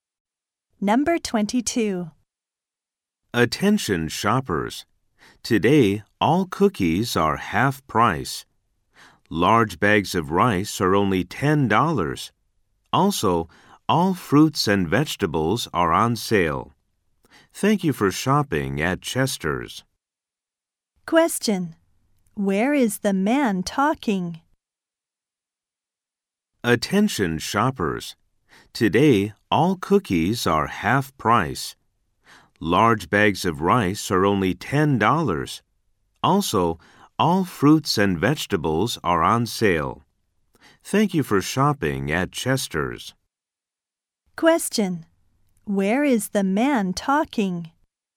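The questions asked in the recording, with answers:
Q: Where is the man talking?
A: At a store (Chester's).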